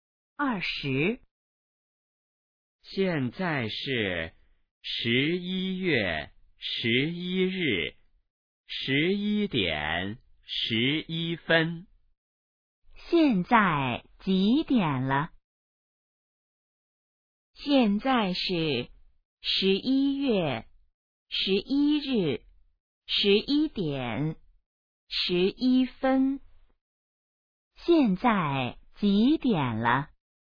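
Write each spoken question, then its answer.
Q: 现在几点了?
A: 11:11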